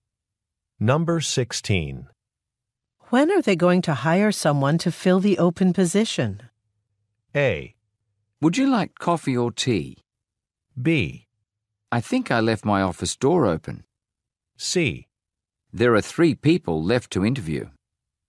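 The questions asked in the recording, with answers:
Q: When are they going to hire someone to fill the open position?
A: C: There are 3 people left to interview.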